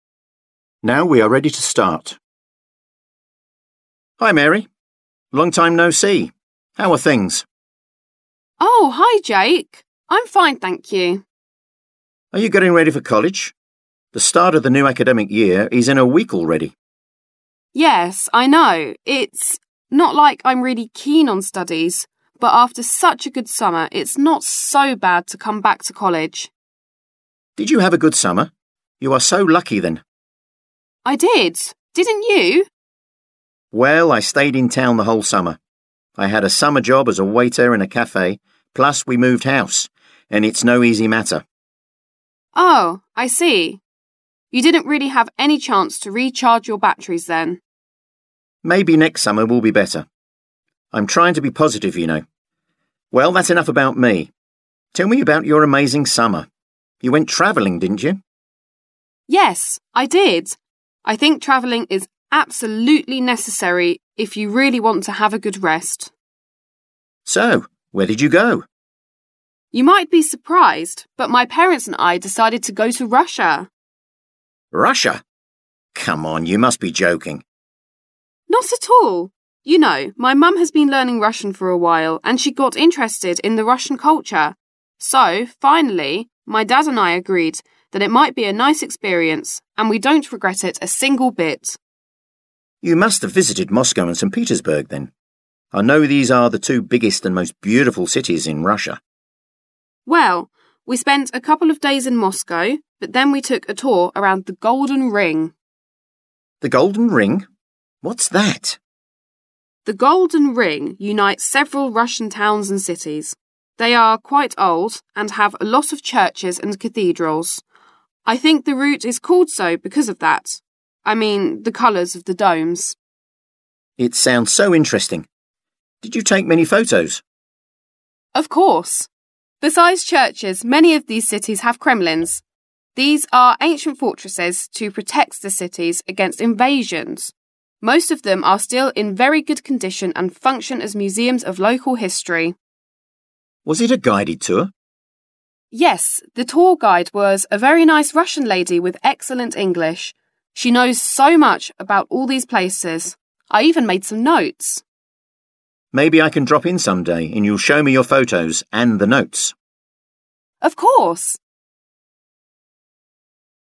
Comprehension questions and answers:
Вы услышите диалог. Определите, какие из приведённых утверждений А-G соответствуют содержанию текста (1 - True), какие не соответствуют (2 - False) и о чём в тексте не сказано, то есть на основании текста нельзя дать ни положительного, ни отрицательного ответа (3 - Not stated). Запишите ответ последовательностью из 7 цифр. Вы услышите запись дважды. Повторное прослушивание не включено в аудиозапись, нужно просто прослушать ещё раз.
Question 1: Mary can't wait to get back to studies.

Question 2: Jake didn't have a chance to travel in summer.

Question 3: Mary's mother speaks Russian fluently.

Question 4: Mary and her parents spent a lot of time in Moscow.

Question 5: Mary's hobby is taking photos of churches.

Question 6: Mary had an English-speaking guide on her tour.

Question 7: Jake wants to see Mary's photos from her trip.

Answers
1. False
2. True
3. Not stated
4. False
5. Not stated
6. True
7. True